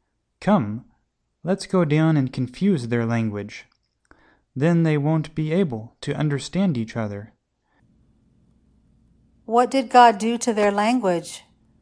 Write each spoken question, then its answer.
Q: What did God do to their language?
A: God confused their language.